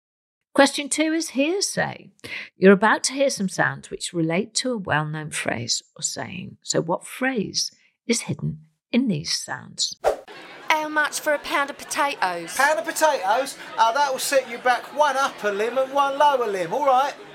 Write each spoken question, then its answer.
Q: So what phrase is hidden in these sounds?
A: And the answer was, costs an arm and a leg.